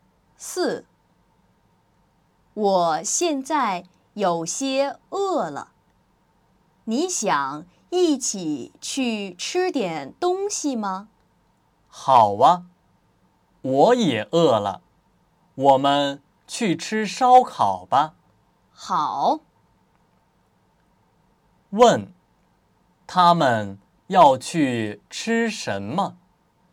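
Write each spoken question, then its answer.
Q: 问,他们要去吃什么?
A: 烧烤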